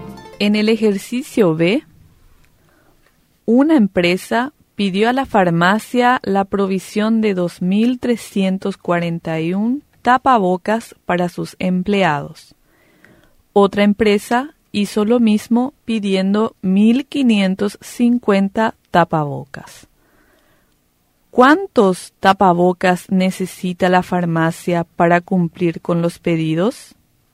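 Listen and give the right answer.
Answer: 3.891 tapabocas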